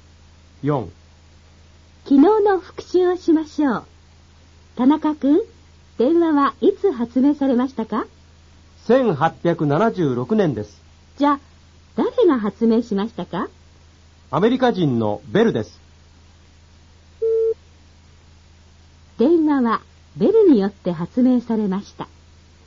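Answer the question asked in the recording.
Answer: 正しい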